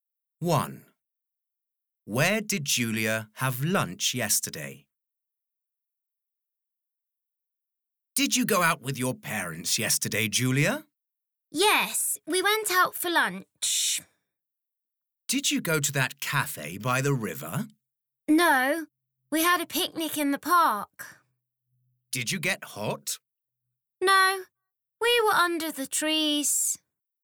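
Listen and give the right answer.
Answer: In the park (a picnic under the trees)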